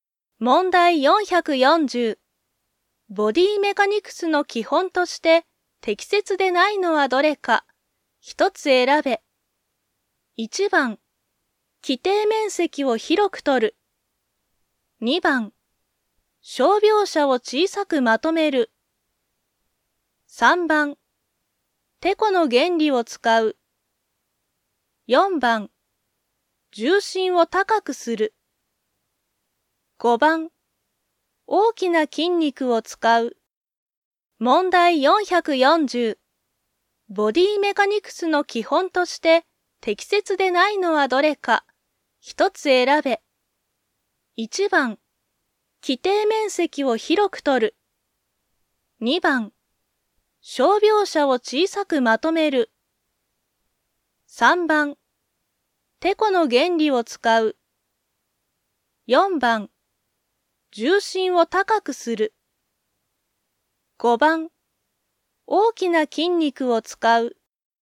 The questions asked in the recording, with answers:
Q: ボディメカニクスの基本として適切でないのはどれか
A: 正解は、4番、重心を高くする。